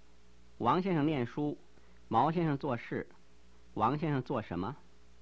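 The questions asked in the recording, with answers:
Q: 王先生做什么?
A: 念书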